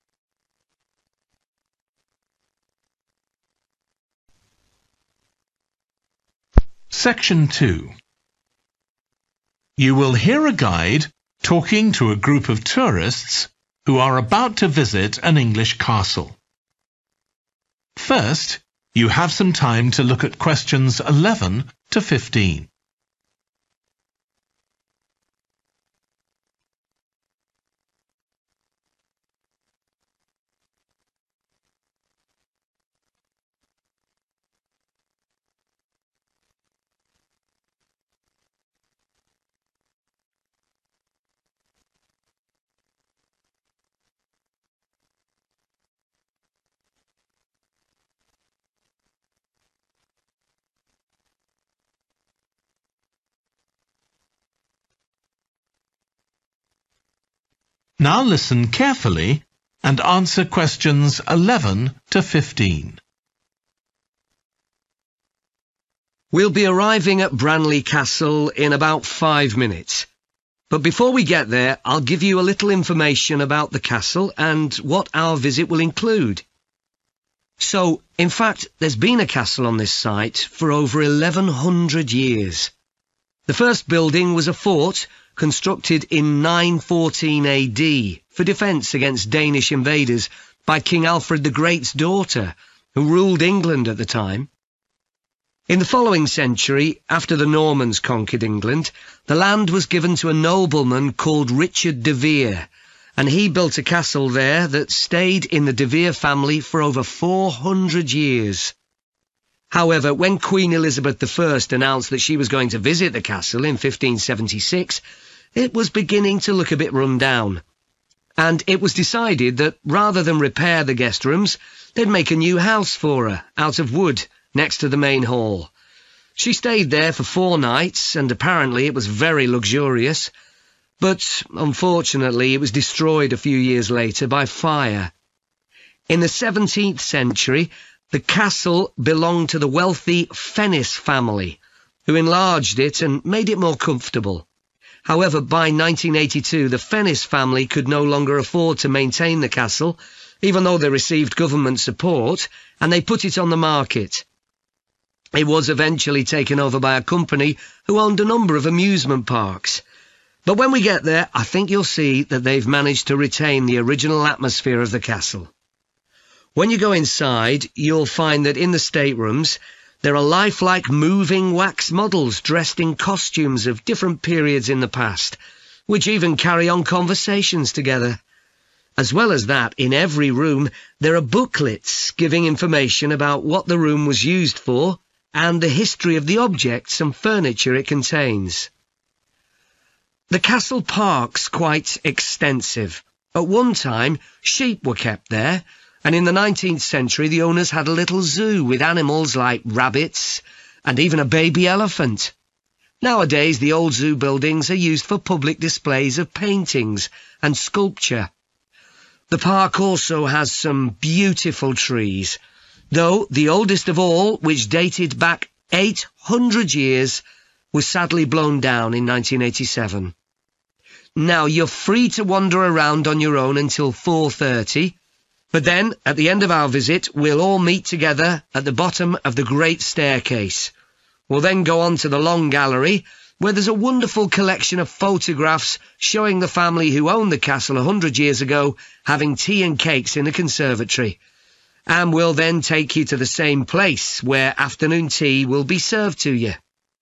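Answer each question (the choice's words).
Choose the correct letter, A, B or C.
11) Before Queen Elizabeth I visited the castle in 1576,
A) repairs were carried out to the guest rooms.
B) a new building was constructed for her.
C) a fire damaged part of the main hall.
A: a new building was constructed for her.

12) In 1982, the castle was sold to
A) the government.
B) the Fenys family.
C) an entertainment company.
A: an entertainment company.

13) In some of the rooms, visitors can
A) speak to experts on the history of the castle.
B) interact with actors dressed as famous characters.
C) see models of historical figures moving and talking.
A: see models of historical figures moving and talking.

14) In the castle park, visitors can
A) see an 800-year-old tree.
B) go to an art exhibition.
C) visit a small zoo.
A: go to an art exhibition.

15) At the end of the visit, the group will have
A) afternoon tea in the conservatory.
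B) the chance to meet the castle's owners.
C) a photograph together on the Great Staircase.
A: afternoon tea in the conservatory.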